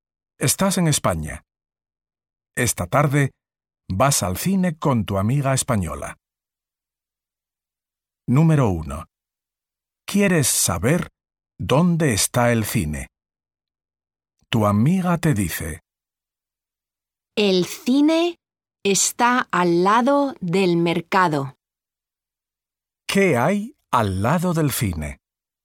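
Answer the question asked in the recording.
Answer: el mercado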